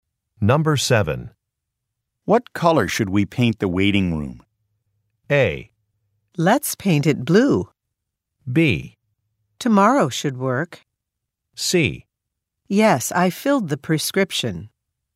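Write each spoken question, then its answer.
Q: What color should we paint the waiting room?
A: A: Let's paint it blue.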